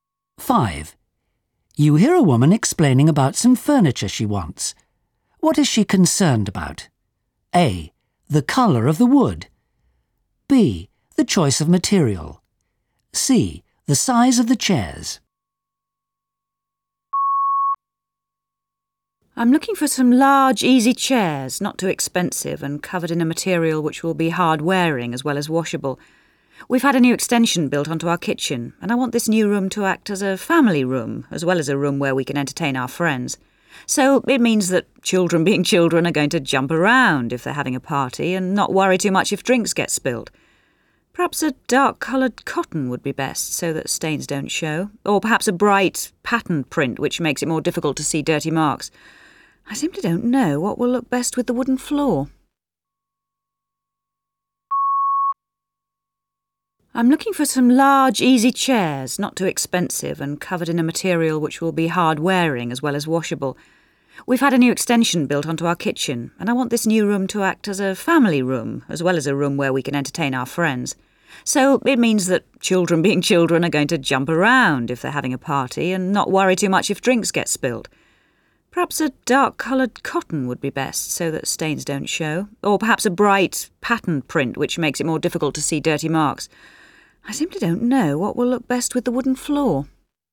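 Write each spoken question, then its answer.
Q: What is she concerned about?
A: B: The choice of material.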